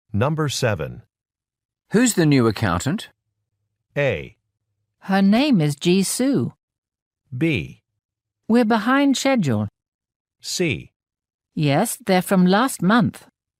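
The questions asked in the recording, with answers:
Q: Who's the new accountant?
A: A: Her name is Ji Su.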